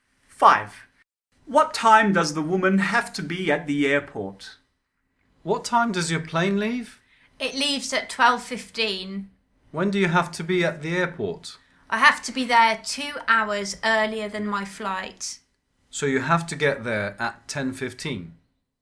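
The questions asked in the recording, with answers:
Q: What time does the woman have to be at the airport?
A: 10:15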